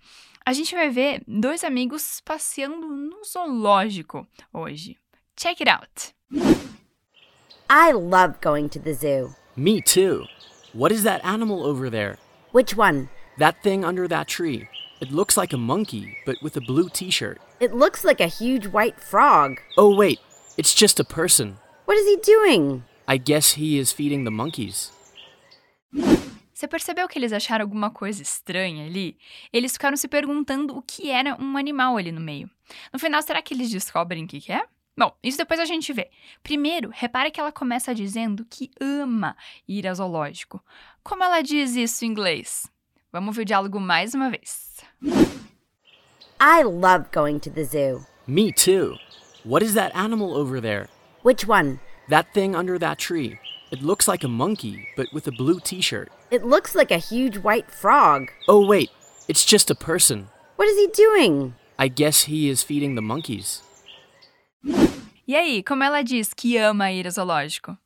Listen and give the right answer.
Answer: Ela diz: I love going to the zoo.